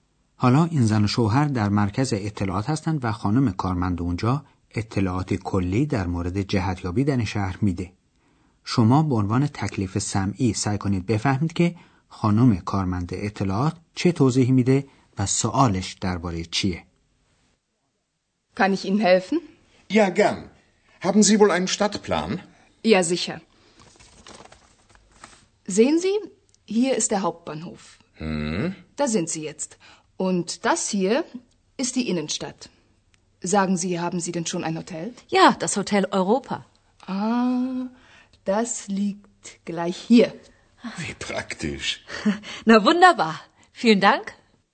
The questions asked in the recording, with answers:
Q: خانم کارمند اطلاعات چه توضیحی میده و سوالش درباره چیه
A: پس خانم کارمن در روی نقشه شهر نشان داد که زن و شوهر الان در کجا هستند.